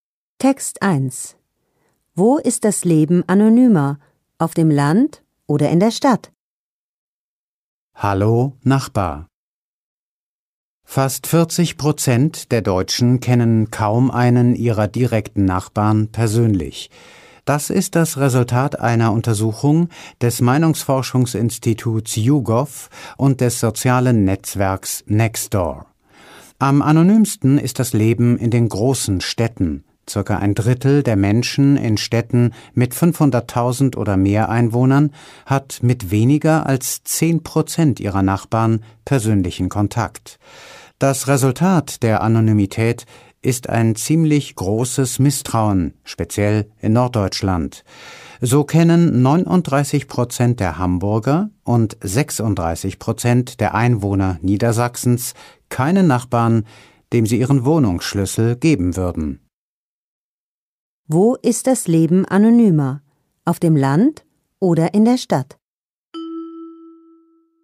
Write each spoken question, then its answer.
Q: Wo ist das Leben anonymer? Auf dem Land oder in der Stadt?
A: Das Leben ist in der Stadt anonymer.